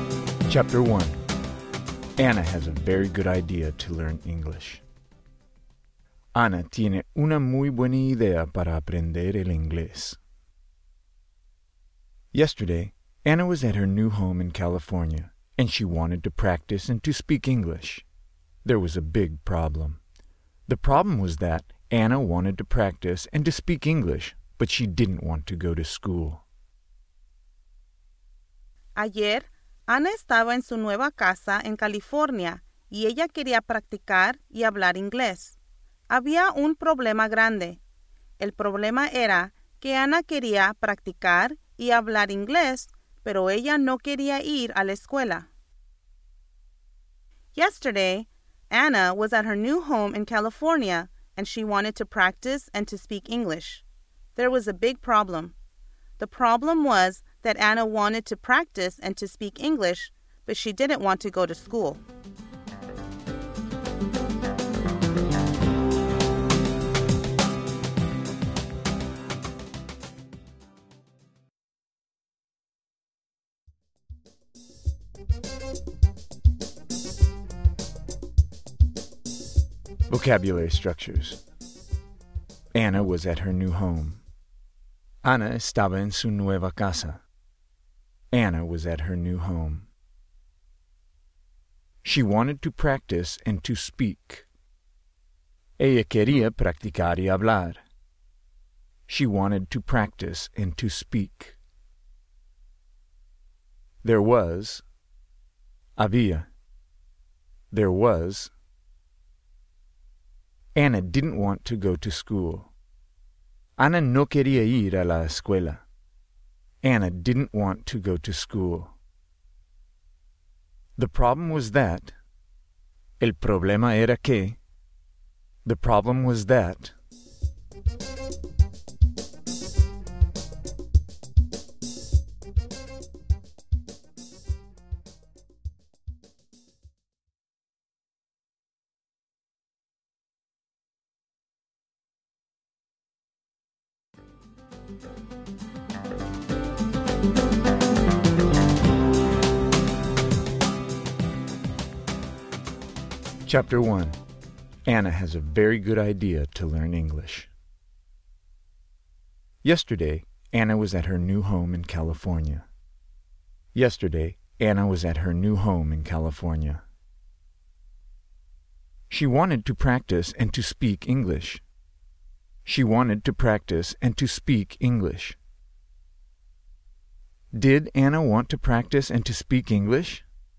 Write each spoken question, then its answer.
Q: Did Anna want to practice and to speak English?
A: Yes.